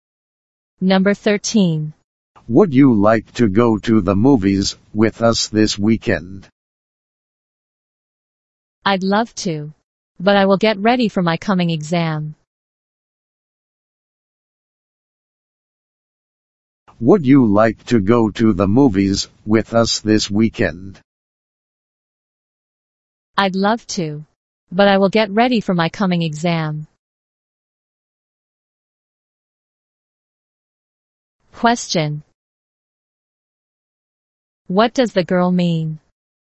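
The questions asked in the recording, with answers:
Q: What does the girl mean?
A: She can't go because she will get ready for her exam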